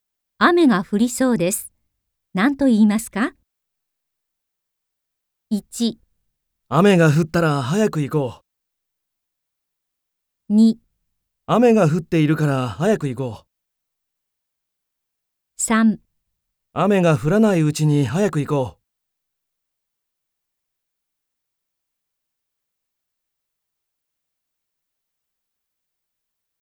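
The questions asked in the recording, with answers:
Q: 雨が降りそうです。何と言いますか ?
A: 3: 雨が降らないうちに早く行こう。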